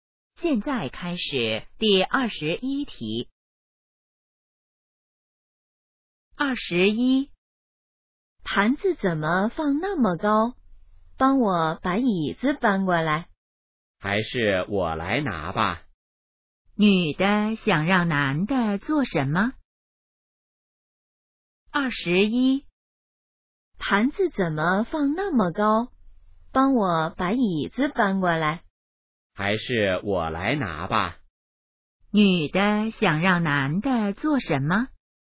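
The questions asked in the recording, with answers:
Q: 女的想让男的做什么?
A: 搬椅子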